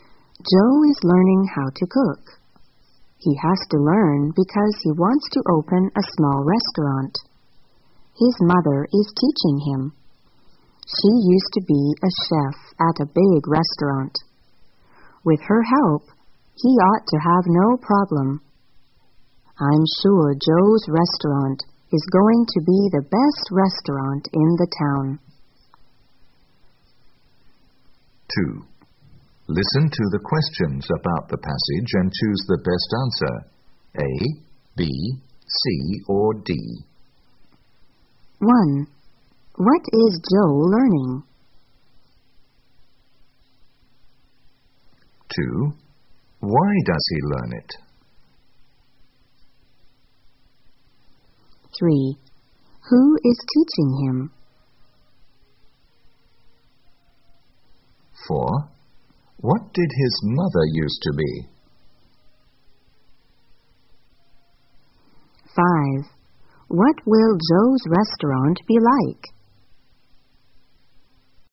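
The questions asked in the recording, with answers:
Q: What is Joe learning?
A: How to cook

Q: Why does he learn it?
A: He wants to open a small restaurant

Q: Who is teaching him?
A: His mother

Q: What did his mother used to be?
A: A chef at a big restaurant

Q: What will Joe's restaurant be like?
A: The best restaurant in the town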